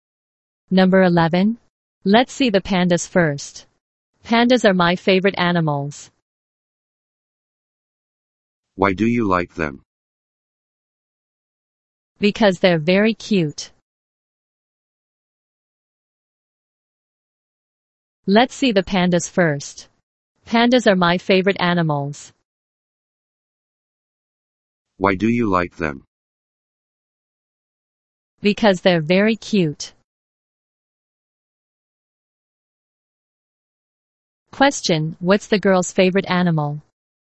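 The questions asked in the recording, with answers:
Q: Question, what's the girl's favorite animal?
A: Pandas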